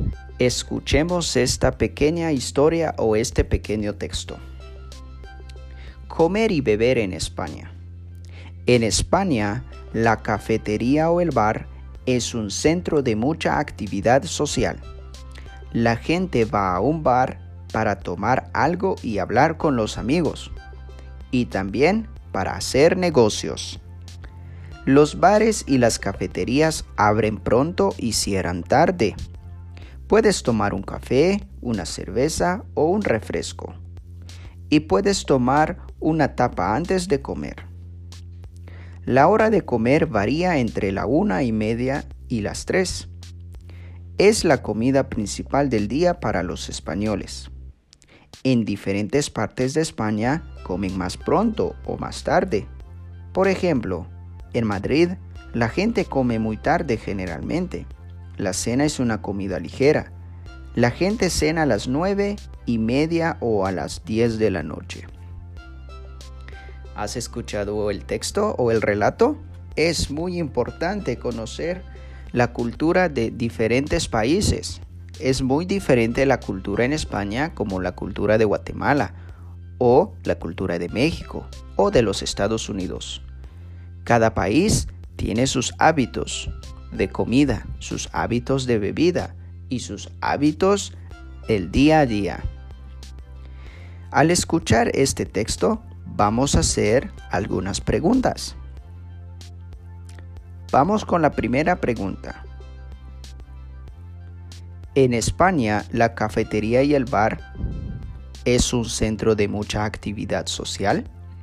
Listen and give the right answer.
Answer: Sí, la cafetería y el bar es un centro de mucha actividad social.